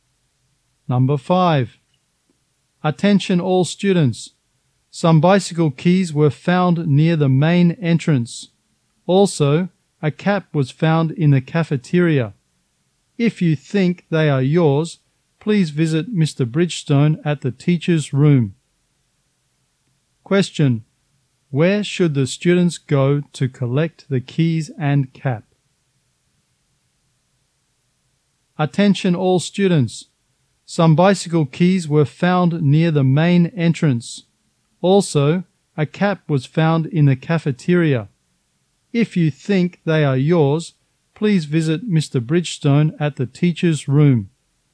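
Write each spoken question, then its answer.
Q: Question. Where should the students go to collect the keys and cap?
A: The teacher's room (to see Mr. Bridgestone)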